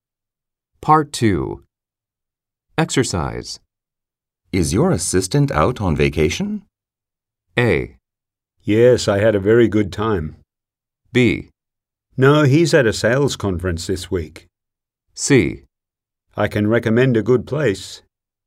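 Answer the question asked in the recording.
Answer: B: No, he's at a sales conference this week.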